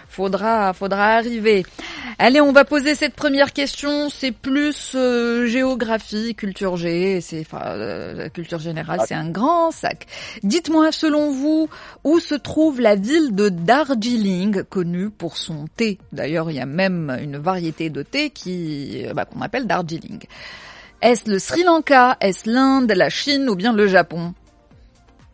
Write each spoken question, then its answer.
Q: Dites-moi, selon vous, où se trouve la ville de Darjeeling, connue pour son thé?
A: C'est effectivement en Inde, la ville de Darjeeling.